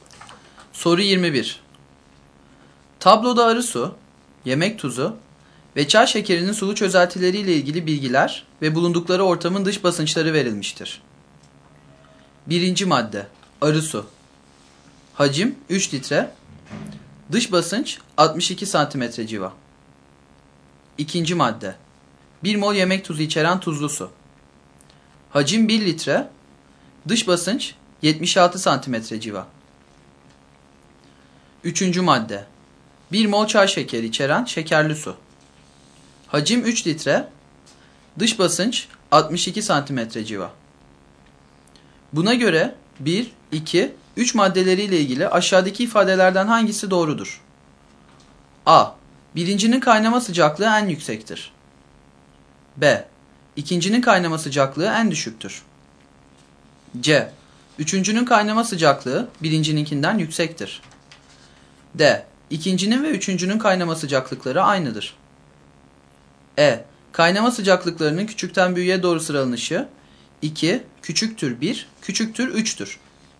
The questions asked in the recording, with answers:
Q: Buna göre 1, 2, 3 maddeleriyle ilgili aşağıdaki ifadelerden hangisi doğrudur?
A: Doğru yanıt C şıkkı.